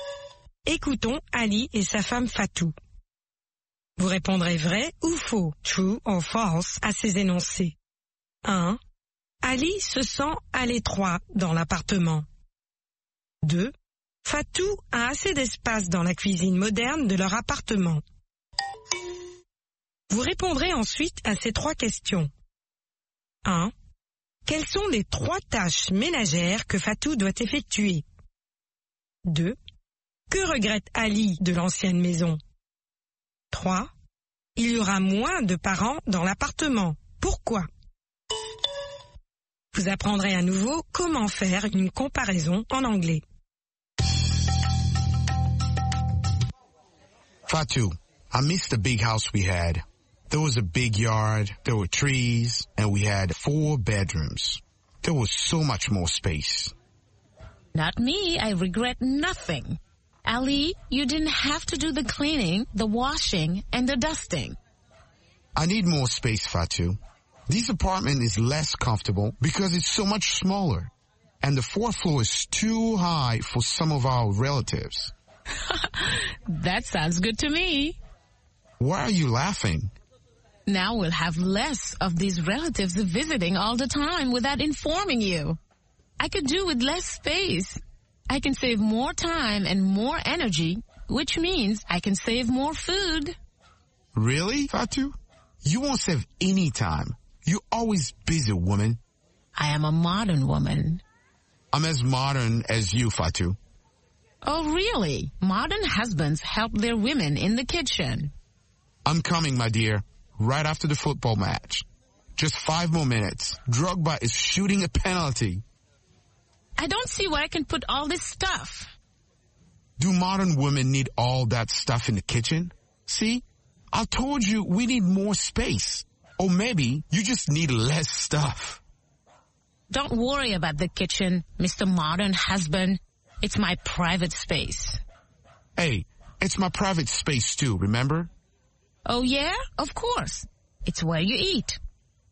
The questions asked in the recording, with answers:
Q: Ali se sent à l'étroit dans l'appartement.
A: L'énoncé 1 est vrai. Ali se sent à l'étroit dans l'appartement.

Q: Fatou a assez d'espace dans la cuisine moderne de leur appartement.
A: L'énoncé 2 est faux. Fatou a assez d'espace dans la cuisine moderne de leur appartement.

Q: Quelles sont les trois tâches ménagères que Fatou doit effectuer?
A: Le ménage, la lessive et l'époustage.

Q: Que regrette Ali de l'ancienne maison?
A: La cour, les arbres, les 4 chambres et l'espace.

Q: Il y aura moins de parents dans l'appartement. Pourquoi?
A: Parce qu'il sera plus difficile de monter au 4e étage.